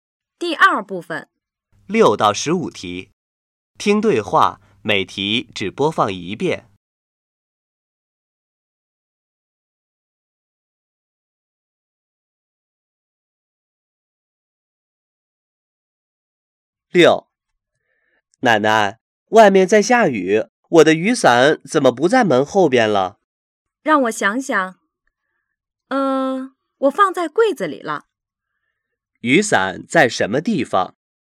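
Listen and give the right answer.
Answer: 柜子里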